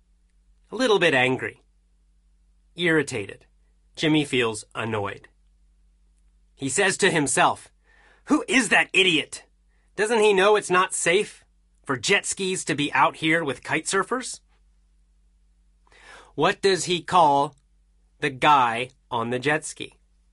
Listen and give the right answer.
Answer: Calls him an idiot.